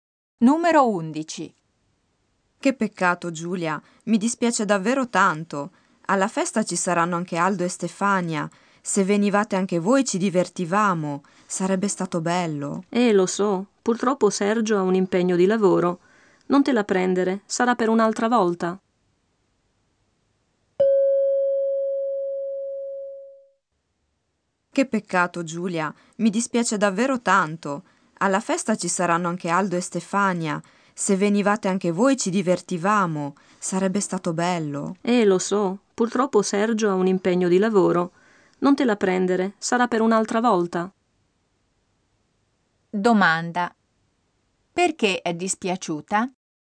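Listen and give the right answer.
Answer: Perché Giulia e Sergio non possono venire alla festa (Sergio ha un impegno di lavoro).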